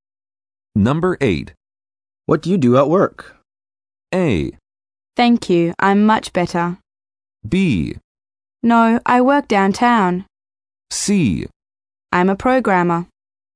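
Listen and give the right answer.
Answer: C: I'm a programmer.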